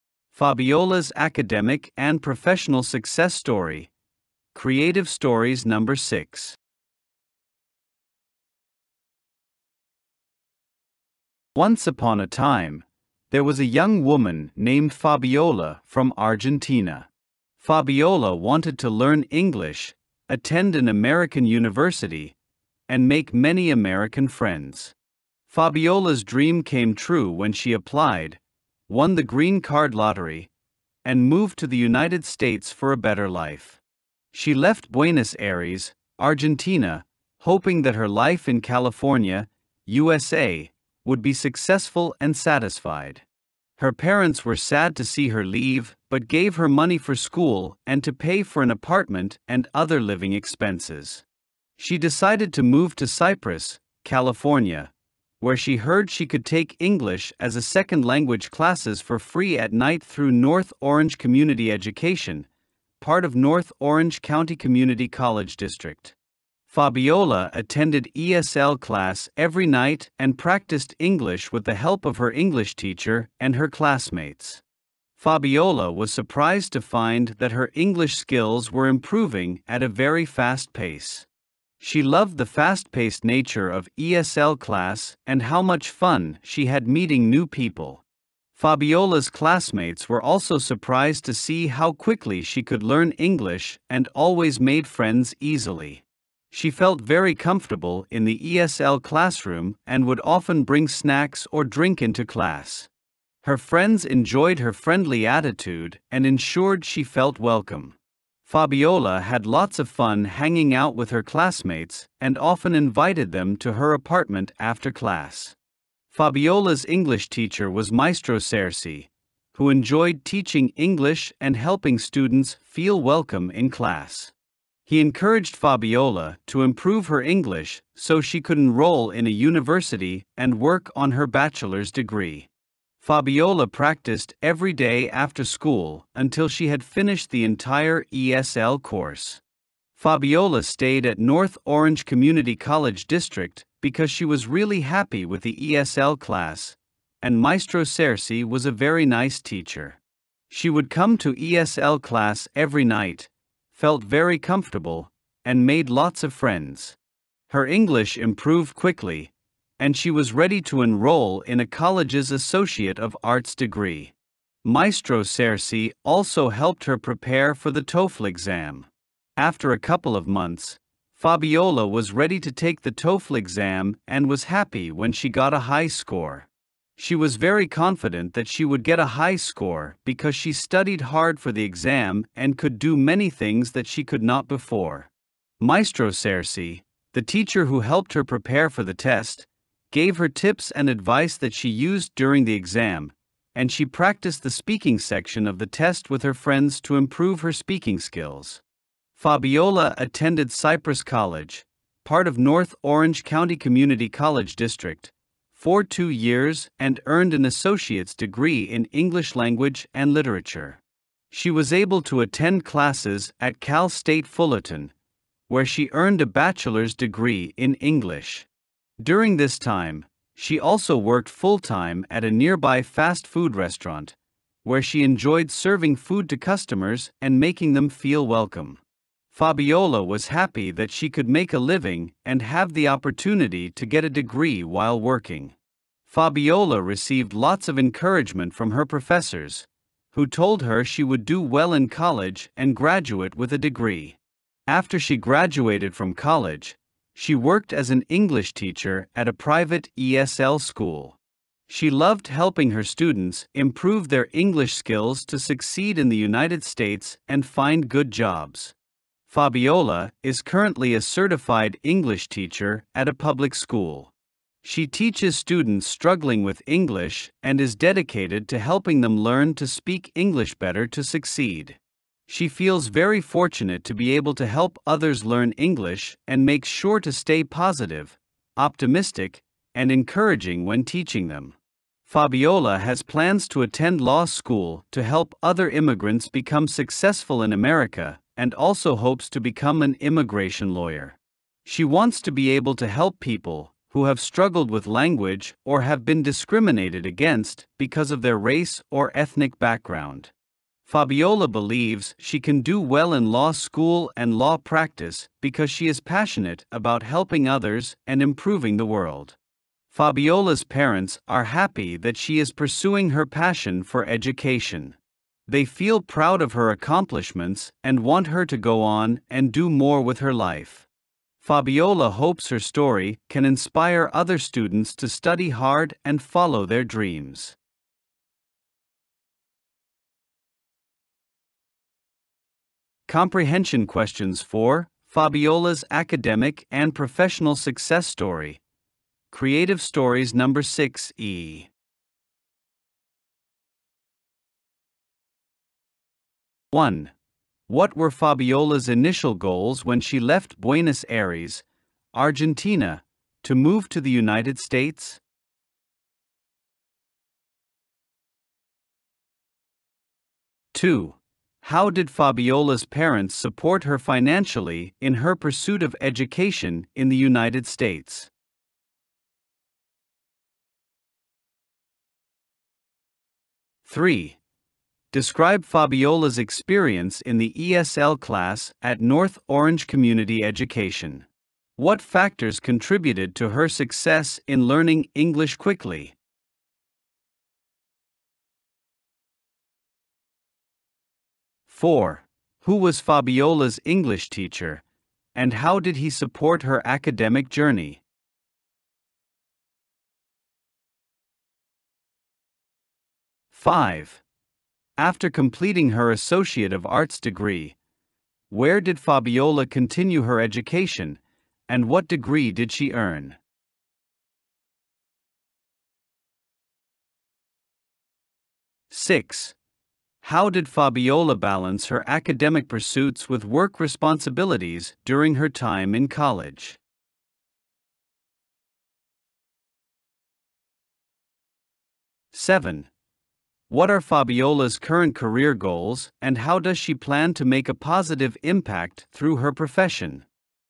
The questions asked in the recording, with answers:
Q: What were Fabiola's initial goals when she left Buenos Aires, Argentina, to move to the United States?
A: Fabiola wanted to learn English, attend an American university, and make many American friends.

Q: How did Fabiola's parents support her financially in her pursuit of education in the United States?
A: Her parents gave her money for school, to pay for an apartment, and other living expenses.

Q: Describe Fabiola's experience in the ESL class at North Orange Community Education. What factors contributed to her success in learning English quickly?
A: Fabiola attended ESL class every night, practiced English with her teacher and classmates, and often socialized with her classmates outside of class.

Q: Who was Fabiola's English teacher, and how did he support her academic journey?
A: Fabiola's English teacher was Maestro Cersei, who encouraged her to improve her English and supported her in preparing for the TOEFL exam.

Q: After completing her Associate of Arts degree, where did Fabiola continue her education, and what degree did she earn?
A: Fabiola continued her education at Cal State Fullerton, where she earned a bachelor's degree in English.

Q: How did Fabiola balance her academic pursuits with work responsibilities during her time in college?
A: Fabiola worked full-time at a fast food restaurant while attending college.

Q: What are Fabiola's current career goals and how does she plan to make a positive impact through her profession?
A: Fabiola plans to attend law school to become an immigration lawyer and help other immigrants succeed in America.